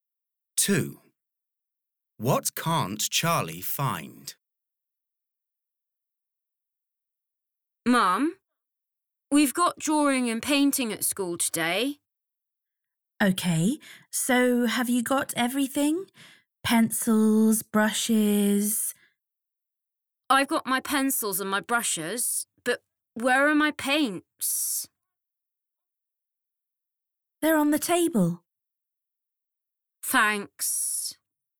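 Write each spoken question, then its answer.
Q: What can't Charlie find?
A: His paints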